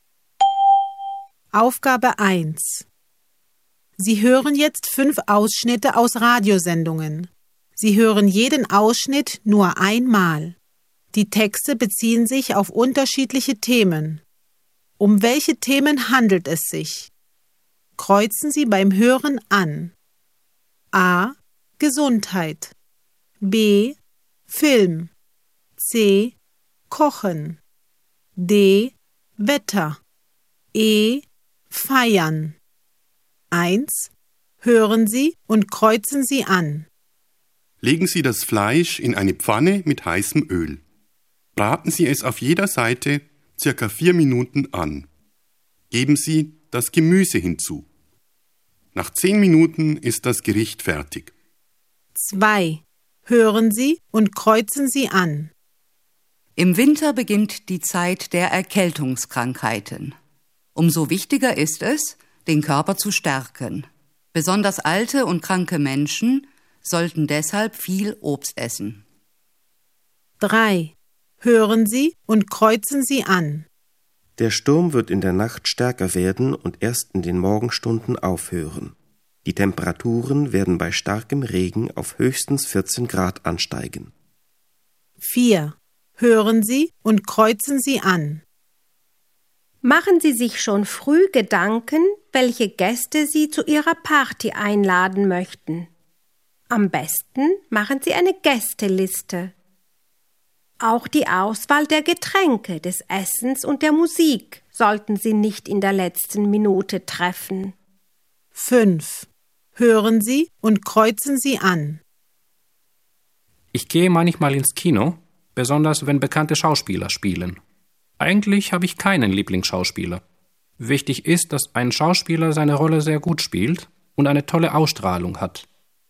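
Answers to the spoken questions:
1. C: Kochen
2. A: Gesundheit
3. D: Wetter
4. E: Feiern
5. B: Film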